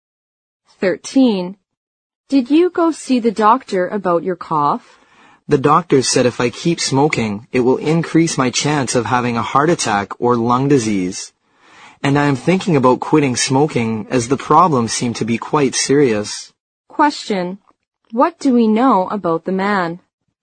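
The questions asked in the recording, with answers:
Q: What do we know about the man?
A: He is thinking about quitting smoking.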